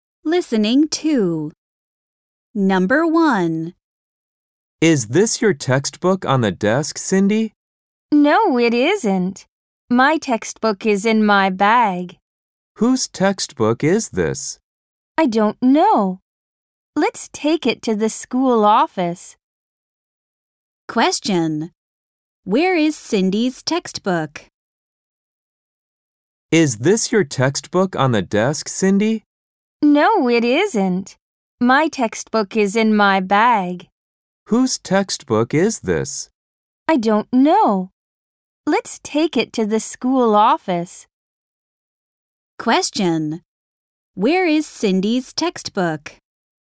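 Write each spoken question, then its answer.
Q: Where is Cindy's textbook?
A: In her bag.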